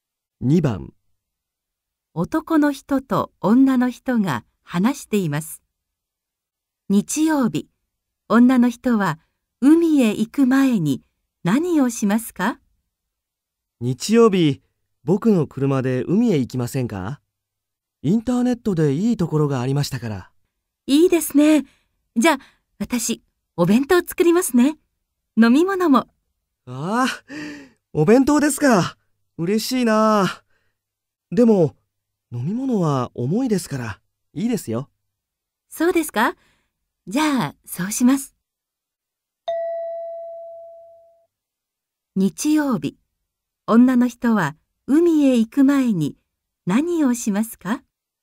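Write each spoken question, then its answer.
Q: 日曜日、女の人は海へ行く前に何をしますか?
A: お弁当を作ります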